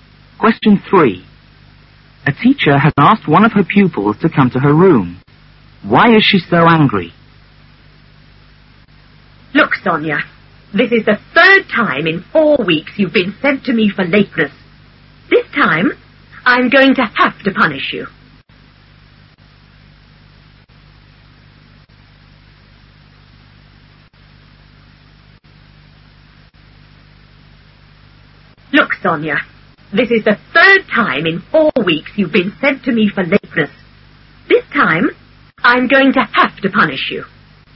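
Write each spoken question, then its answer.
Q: Why is she so angry?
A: Sonia has been sent to her for lateness for the 3rd time in 4 weeks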